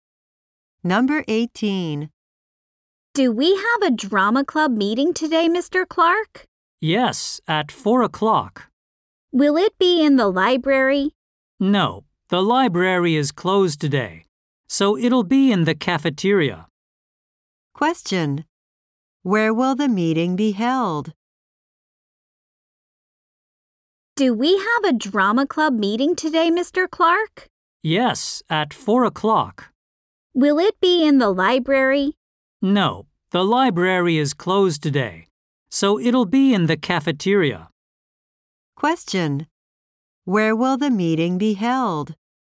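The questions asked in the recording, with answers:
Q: Where will the meeting be held?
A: In the cafeteria.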